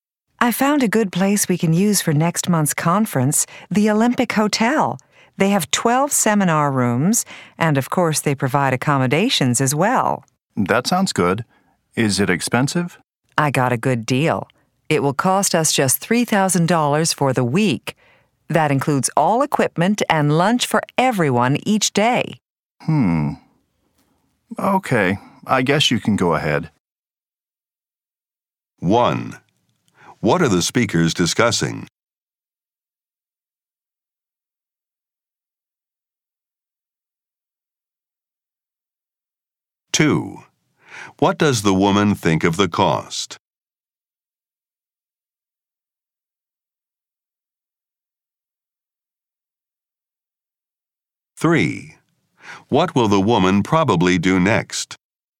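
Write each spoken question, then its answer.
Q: What are the speakers discussing?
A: A place (the Olympic Hotel) for next month's conference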